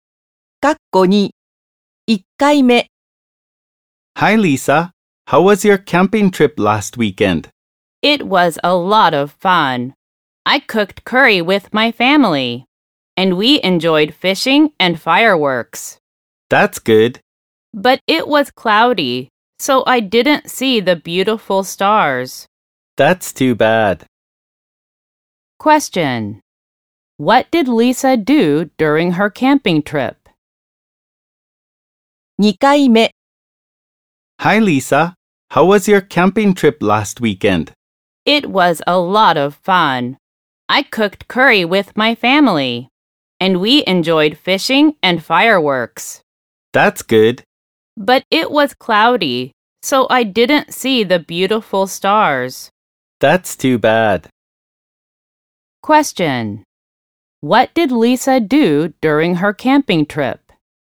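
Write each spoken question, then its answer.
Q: What did Lisa do during her camping trip?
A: She cooked curry with her family and enjoyed fishing and fireworks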